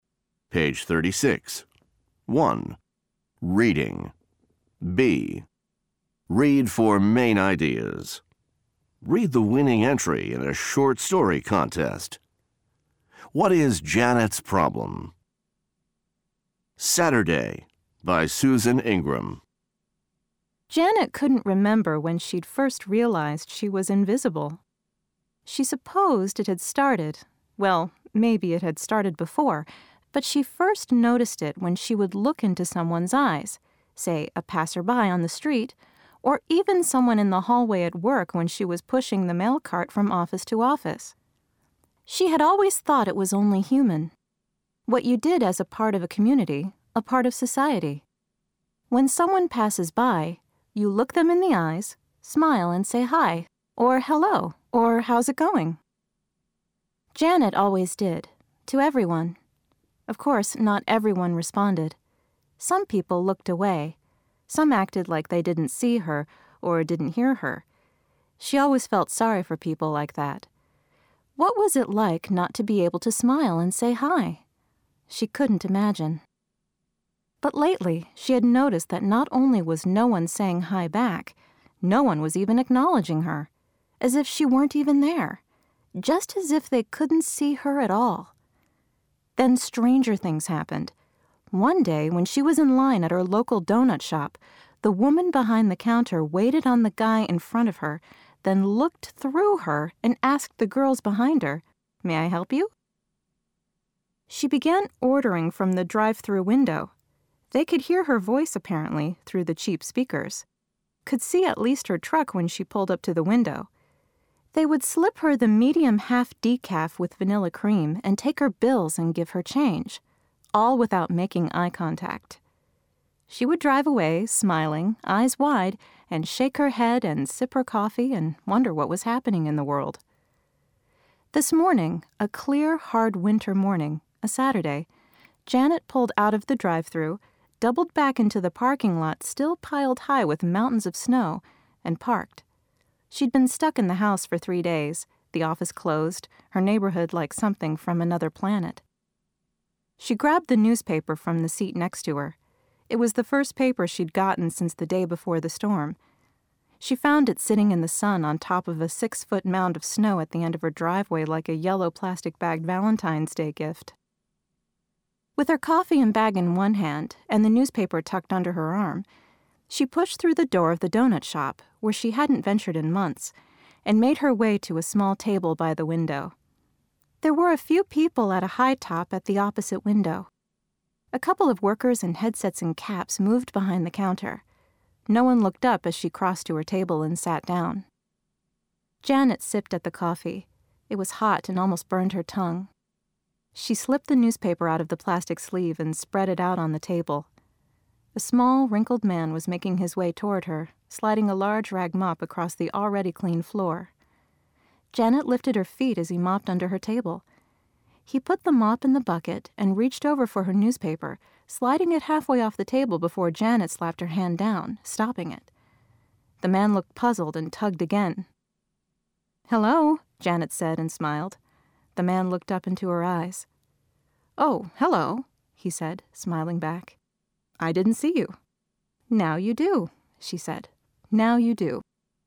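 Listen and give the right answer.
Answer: People don't notice or acknowledge her; she feels invisible.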